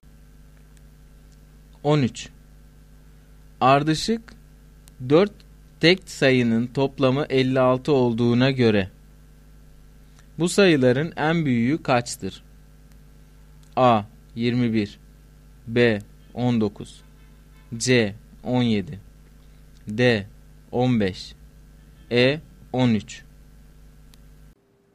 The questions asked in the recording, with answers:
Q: Ardışık 4 tek sayının toplamı 56 olduğuna göre bu sayıların en büyüğü kaçtır?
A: Doğru cevap C şıkkı.